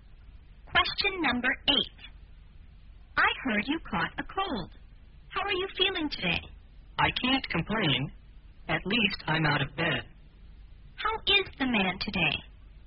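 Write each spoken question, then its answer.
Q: How is the man today?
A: He is getting better; he's out of bed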